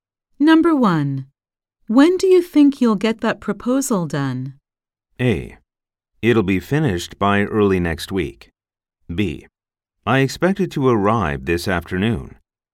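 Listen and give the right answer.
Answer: A: It'll be finished by early next week.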